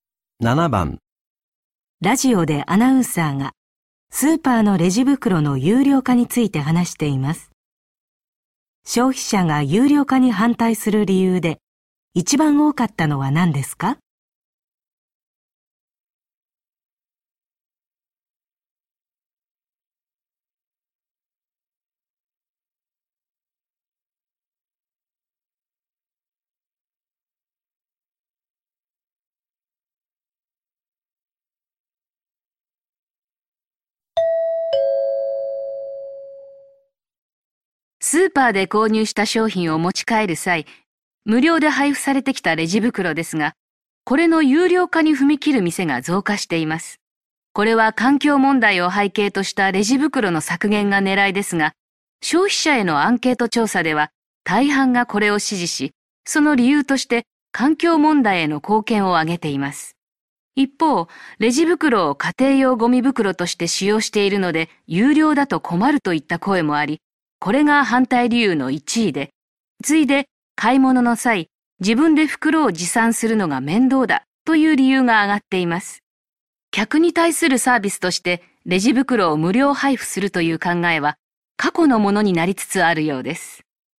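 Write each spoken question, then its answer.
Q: 消費者が有料化に反対する理由で一番多かったのは何ですか?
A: レジ袋を家庭用ゴミ袋として使っているから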